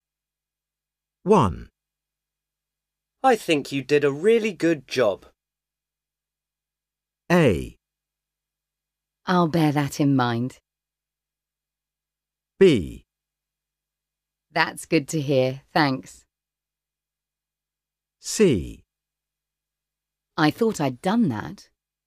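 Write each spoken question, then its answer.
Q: I think you did a really good job.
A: B: That's good to hear, thanks.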